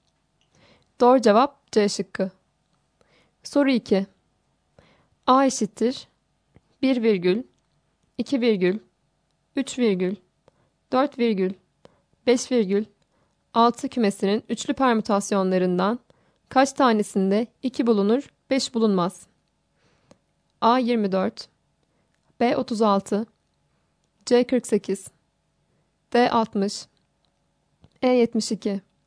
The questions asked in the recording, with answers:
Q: A eşittir 1 virgül, 2 virgül, 3 virgül, 4 virgül, 5 virgül, 6 kümesinin üçlü permütasyonlarından kaç tanesinde 2 bulunur, 5 bulunmaz?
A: Doğru cevap B şıkkı.